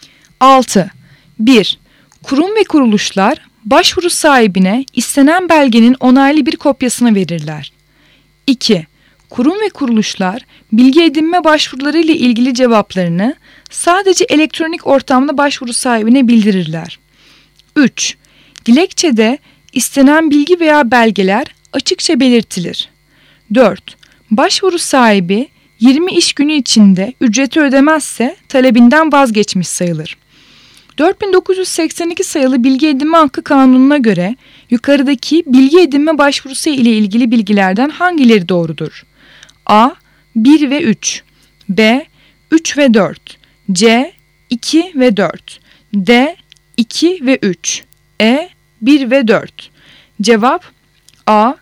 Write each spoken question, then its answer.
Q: 4982 sayılı Bilgi Edinme Hakkı Kanunu'na göre yukarıdaki bilgi edinme başvurusu ile ilgili bilgilerden hangileri doğrudur?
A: Cevap A. 1 ve 3